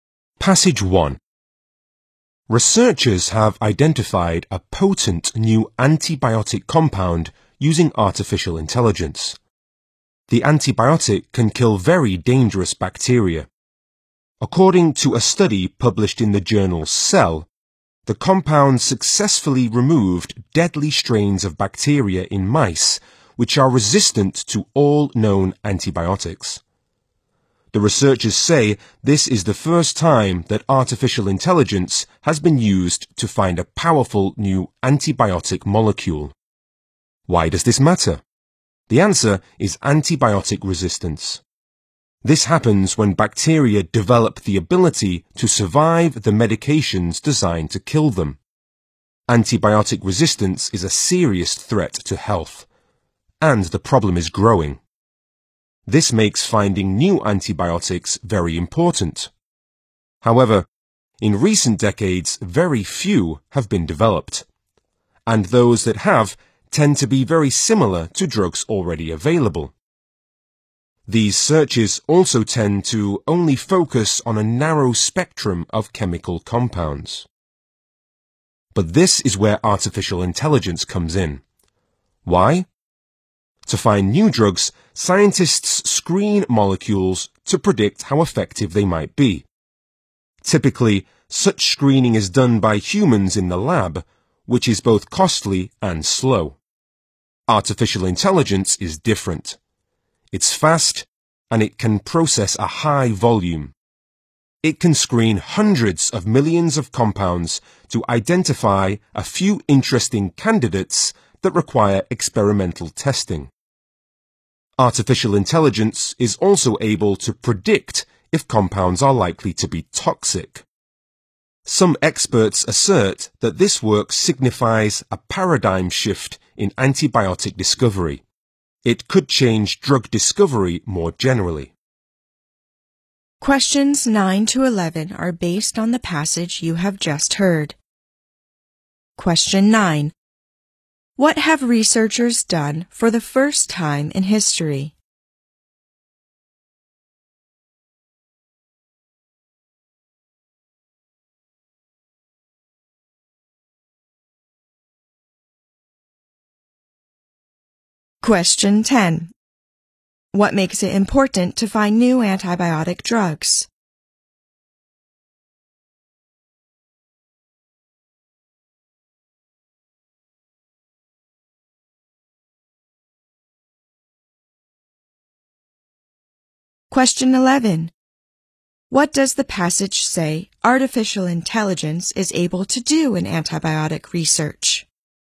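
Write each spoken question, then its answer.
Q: What have researchers done for the first time in history?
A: Used artificial intelligence to find a powerful new antibiotic.

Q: What makes it important to find new antibiotic drugs?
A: Antibiotic resistance, a serious and growing threat to health.

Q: What does the passage say artificial intelligence is able to do in antibiotic research?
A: Quickly screen hundreds of millions of compounds and predict whether they are likely to be toxic.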